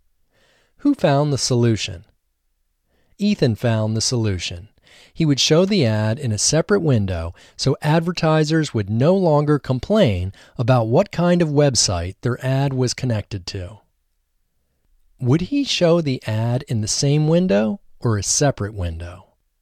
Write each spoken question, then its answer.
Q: Would he show the ad in the same window or a separate window?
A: He would show the ad in a separate window.